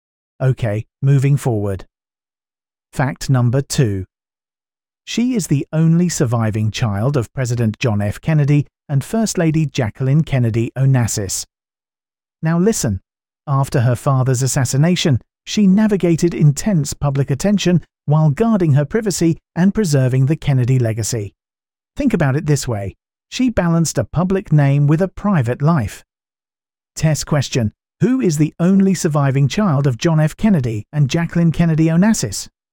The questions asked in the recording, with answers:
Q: Who is the only surviving child of John F. Kennedy and Jacqueline Kennedy Onassis?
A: Correct answer. Caroline Kennedy.